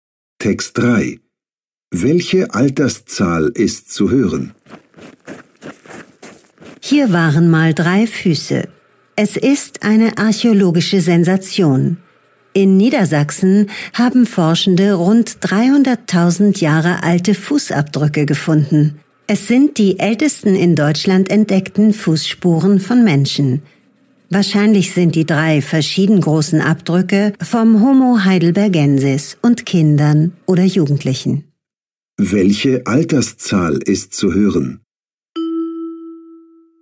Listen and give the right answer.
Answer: 300.000. Die entdeckten Fußabdrücke sind rund 300.000 Jahre alt.